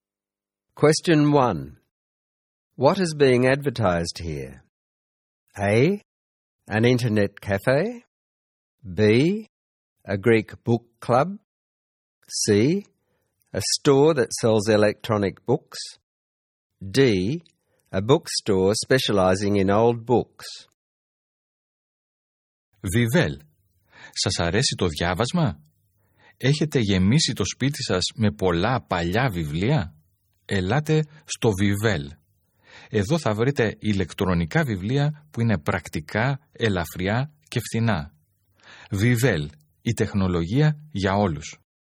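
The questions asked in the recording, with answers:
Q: What is being advertised here?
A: C: A store that sells electronic books.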